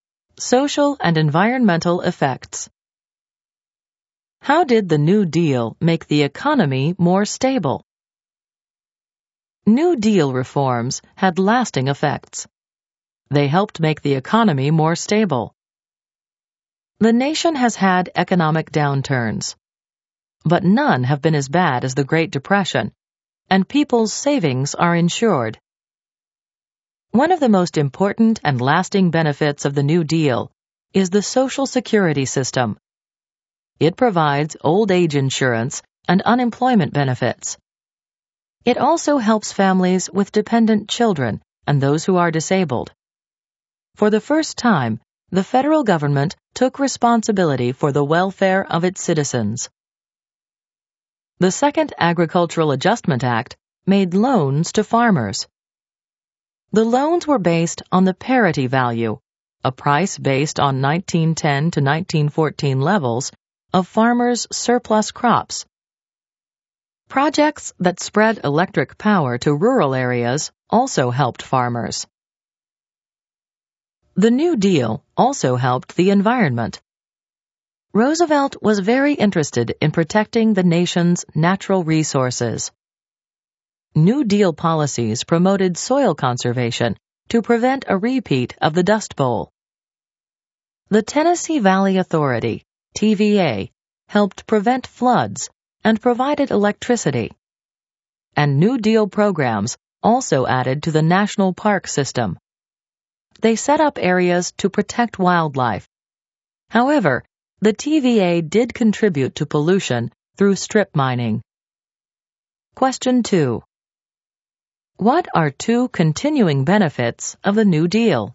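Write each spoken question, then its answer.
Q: What are two continuing benefits of the New Deal?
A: Social Security and insured savings (FDIC); also SEC regulation, NLRB, conservation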